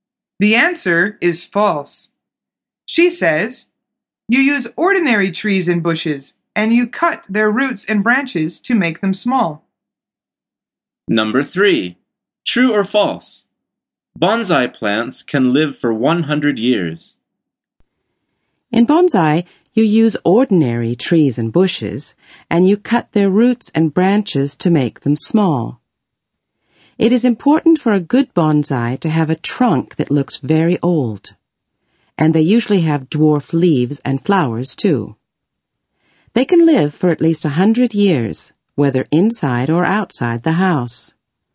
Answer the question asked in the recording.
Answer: The answer is true.